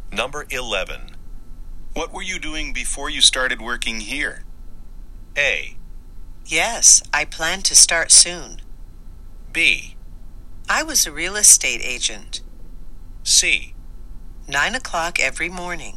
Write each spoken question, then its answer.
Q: What were you doing before you started working here?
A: 選択肢 B が正答です。